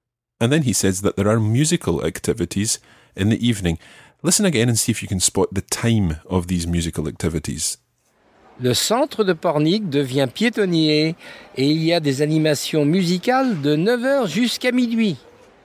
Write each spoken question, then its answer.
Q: Listen again and see if you can spot the time of these musical activities.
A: So from 9h, de 9h à minuit.